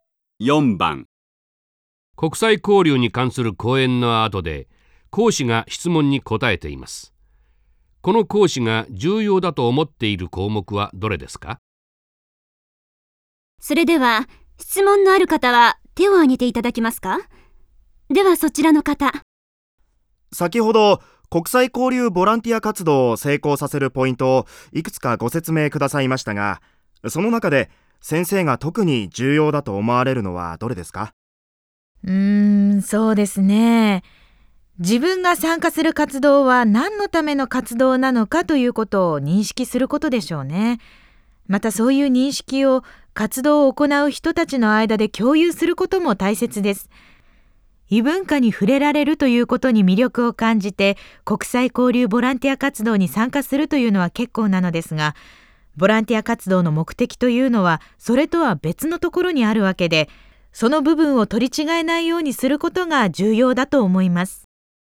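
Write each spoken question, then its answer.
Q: この講師が重要だと思っている項目はどれですか?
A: 活動の目的を認識し、参加する人たちの間で共有すること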